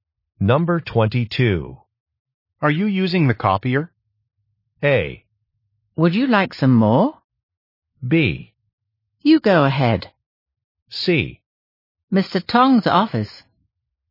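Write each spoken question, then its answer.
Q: Are you using the copier?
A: B: You go ahead.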